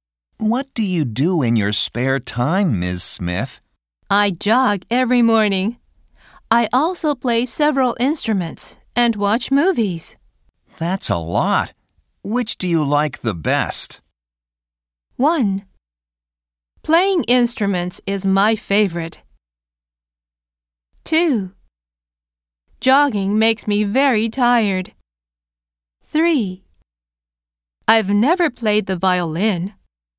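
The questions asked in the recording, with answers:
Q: That's a lot. Which do you like the best?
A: 1: Playing instruments is my favorite.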